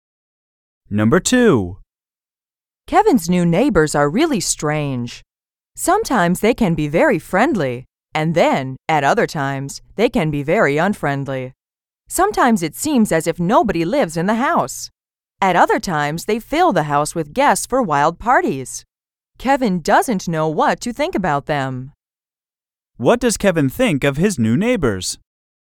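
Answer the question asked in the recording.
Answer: He thinks they are really strange and doesn't know what to think about them.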